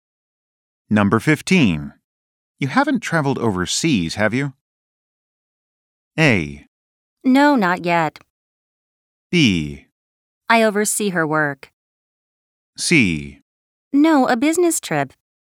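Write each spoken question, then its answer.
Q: You haven't traveled overseas, have you?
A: A: No, not yet.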